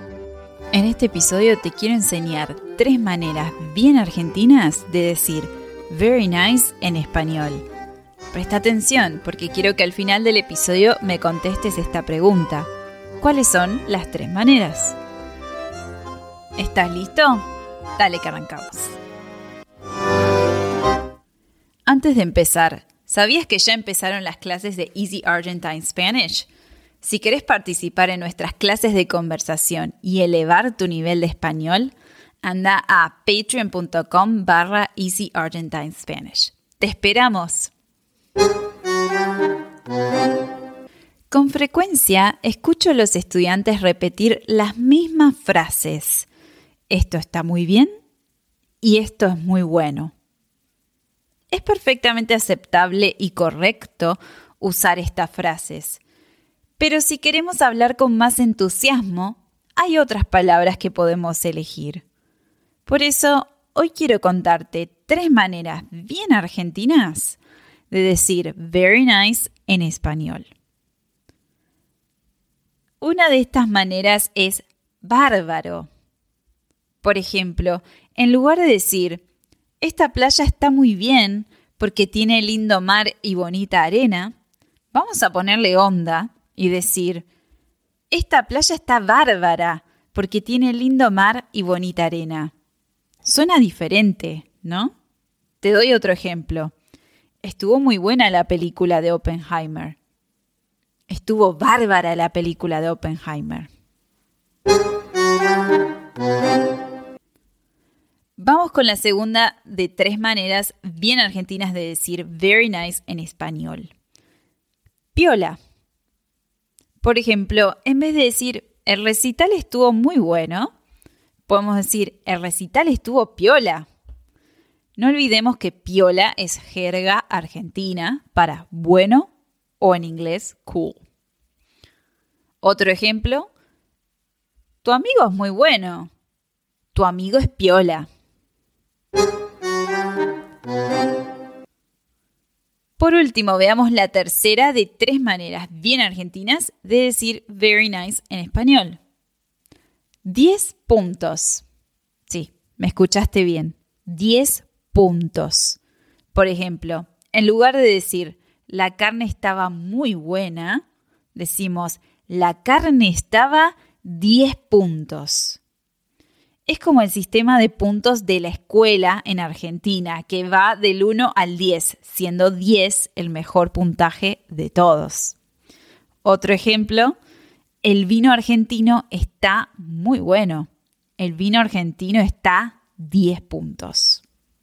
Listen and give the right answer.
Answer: las tres maneras de decir very nice en español al estilo argentino son bárbaro, piola y 10 puntos